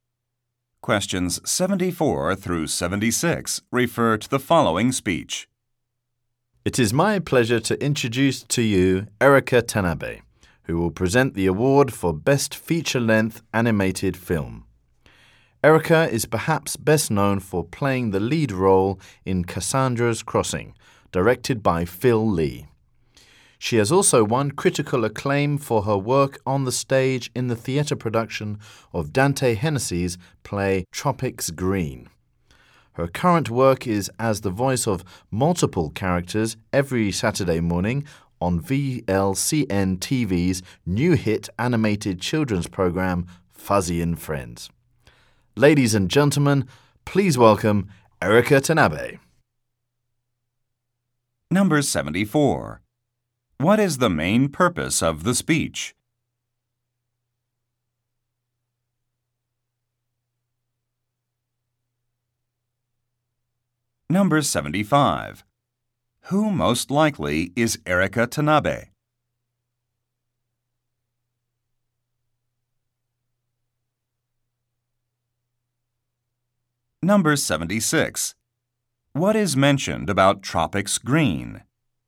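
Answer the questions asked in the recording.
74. To introduce an award presenter
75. An actress
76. It is a stage play by Dante Hennessy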